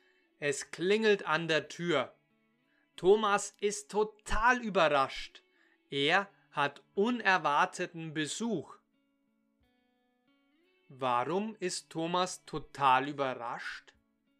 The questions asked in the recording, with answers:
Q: Warum ist Thomas total überrascht?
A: Weil er unerwarteten Besuch hat.